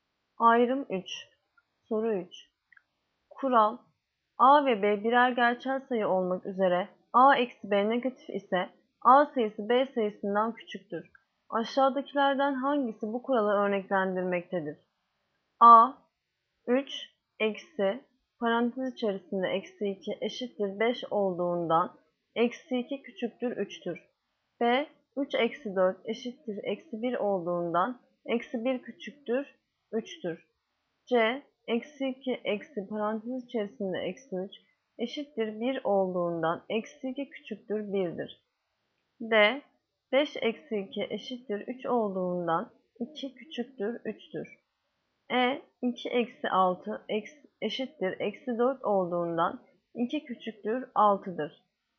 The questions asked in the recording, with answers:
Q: Aşağıdakilerden hangisi bu kuralı örneklendirmektedir?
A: Yanıt: Edirne, 2 eksi 6 eşittir eksi 4 olduğundan 2 küçüktür 6'dır.